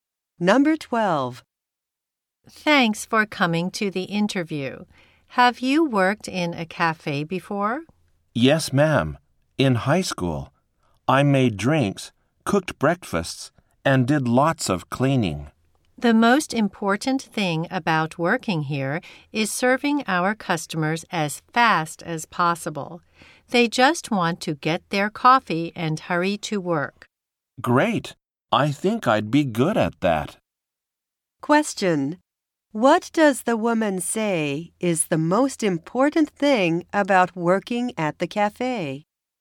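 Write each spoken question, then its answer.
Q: What does the woman say is the most important thing about working at the cafe?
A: Serving customers as fast as possible.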